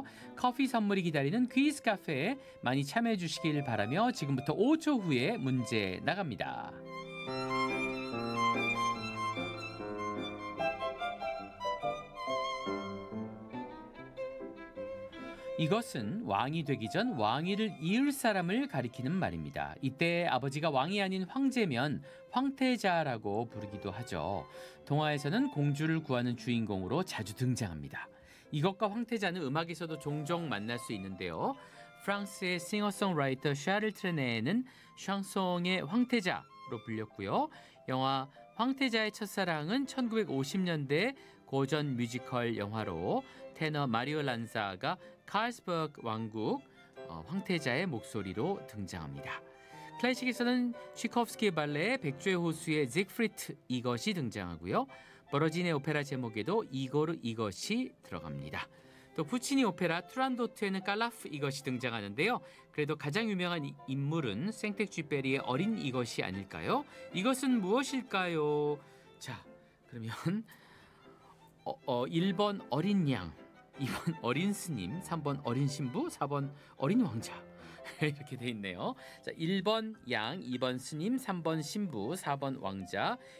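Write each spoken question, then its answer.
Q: 이것은 무엇일까요?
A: 4번: 어린 왕자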